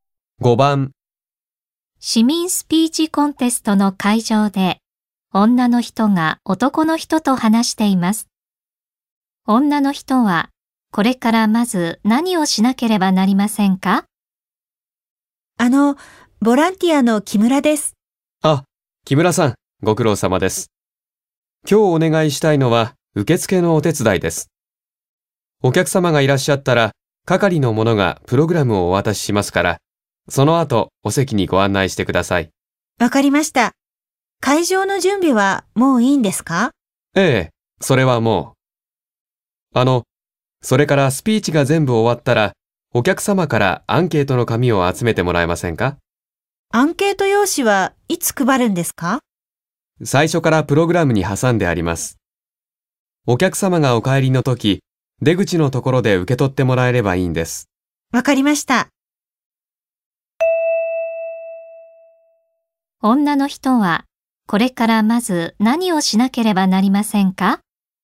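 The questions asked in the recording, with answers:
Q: 女の人は、これからまず何をしなければなりませんか?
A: お客様を席に案内する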